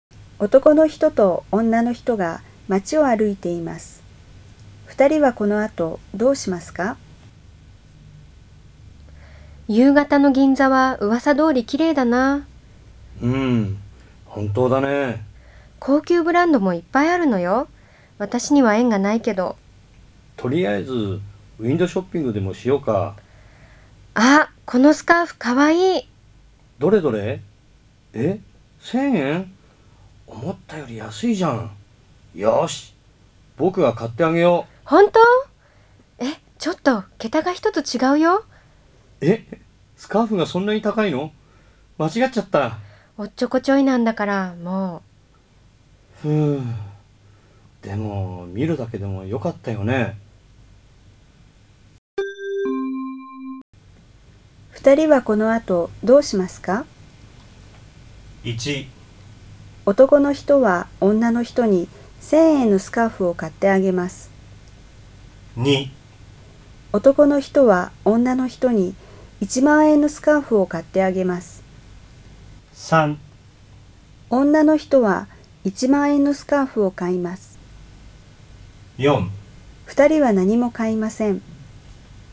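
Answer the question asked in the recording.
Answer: 4: 2人は何も買いません。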